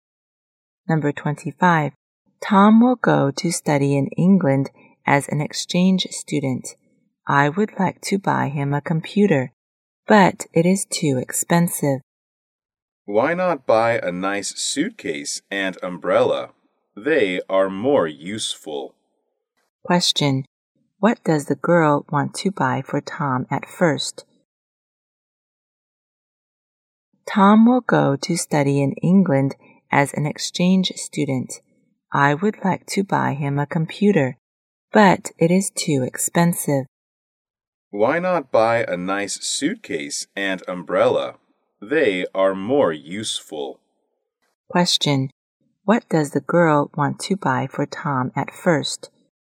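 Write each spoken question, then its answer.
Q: What does the girl want to buy for Tom at first?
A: A computer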